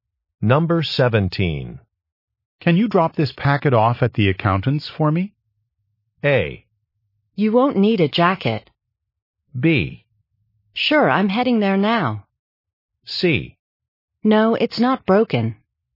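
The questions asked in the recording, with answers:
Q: Can you drop this packet off at the accountant's for me?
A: B: Sure, I'm heading there now.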